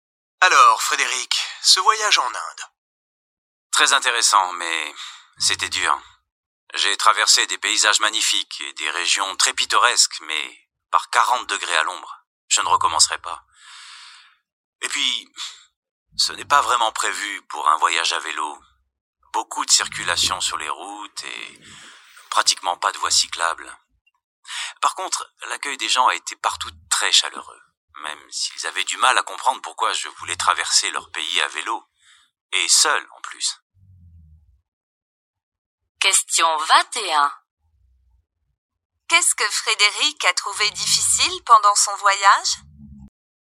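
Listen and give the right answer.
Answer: La chaleur et la circulation sans voies cyclables pour le vélo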